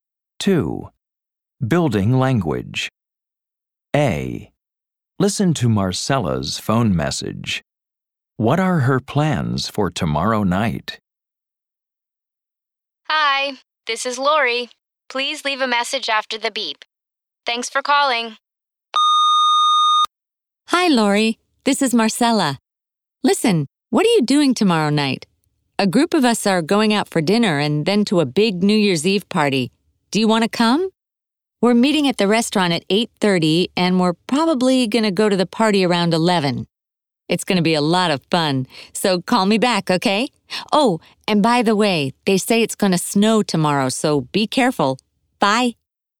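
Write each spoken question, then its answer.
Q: What are her plans for tomorrow night?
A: Going out for dinner with a group, then to a big New Year's Eve party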